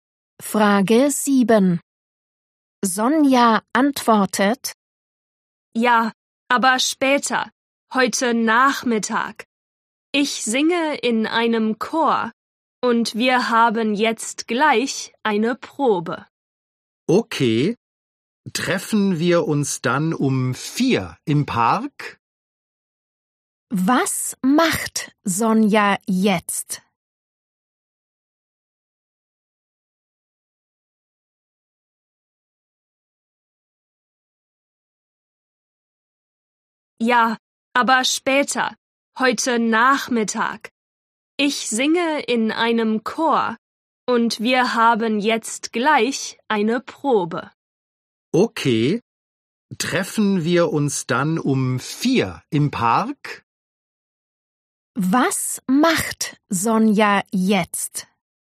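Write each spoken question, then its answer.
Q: Was macht Sonja jetzt?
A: Sie geht zur Chorprobe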